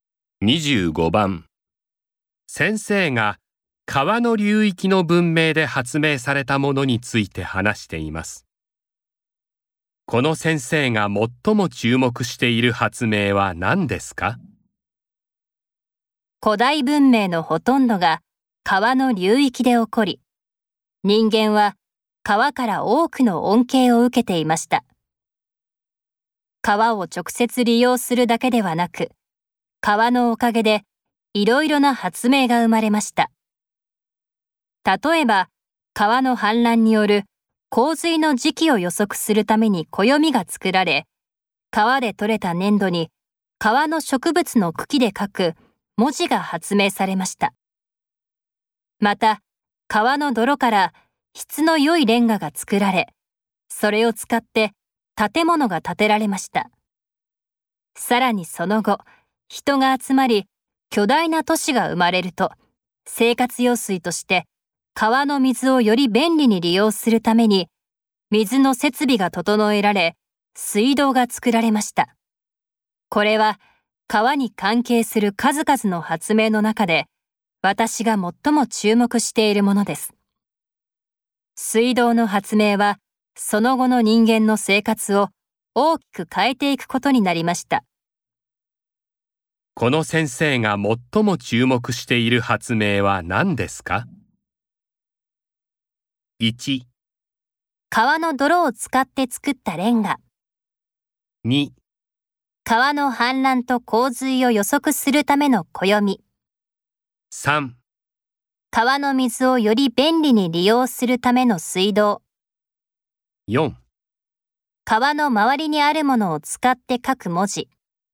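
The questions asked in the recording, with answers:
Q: この先生が最も注目している発明は何ですか?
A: 3: 川の水をより便利に利用するための水道。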